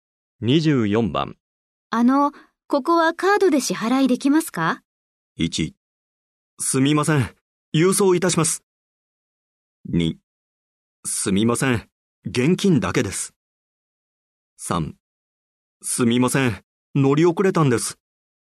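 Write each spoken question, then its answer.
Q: ここはカードで支払いできますか?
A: 2: すみません。現金だけです。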